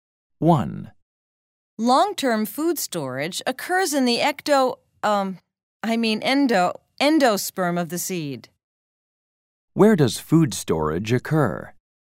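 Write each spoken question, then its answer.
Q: Where does food storage occur?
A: In the endosperm of the seed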